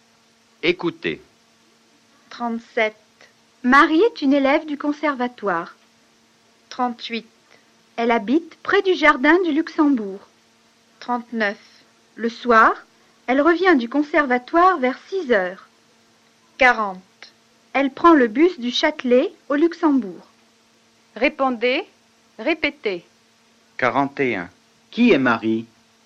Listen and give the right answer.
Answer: Marie est une élève du conservatoire.